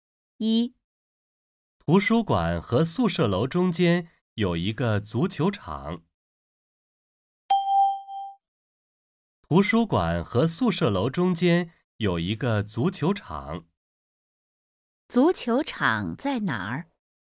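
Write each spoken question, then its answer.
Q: 足球场在哪儿?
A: 在图书馆和宿舍楼中间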